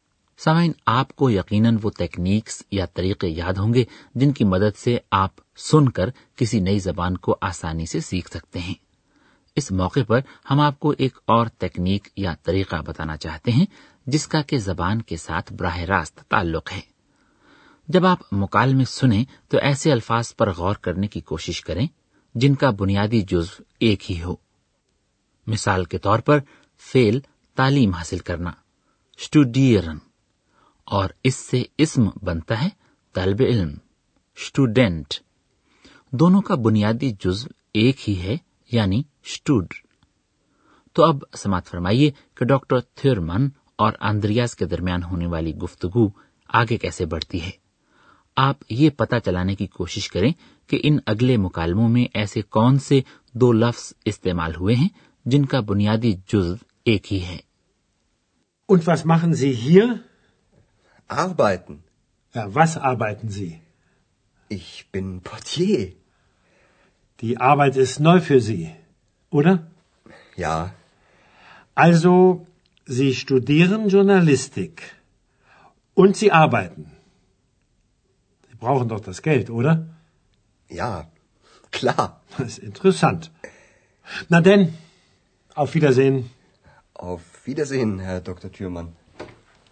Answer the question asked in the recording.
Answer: وہ دونوں الفاظ جن کا بنیادی جزو ایک ہی تھا وہ ہیں فیل کام کرنا آر بائٹن اور اسم کام آر byte